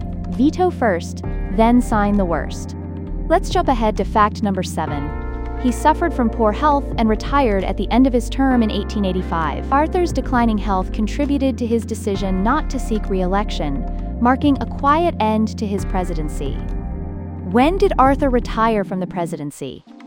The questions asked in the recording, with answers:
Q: When did Arthur retire from the presidency?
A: 1885.